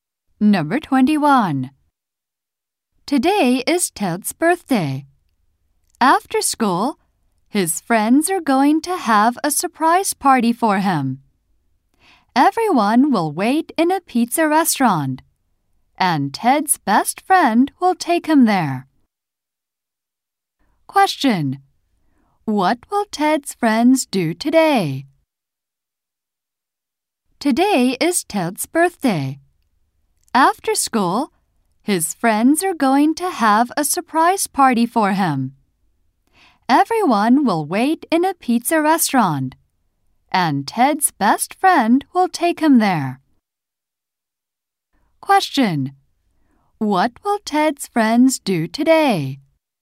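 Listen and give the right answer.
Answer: Have a surprise party for Ted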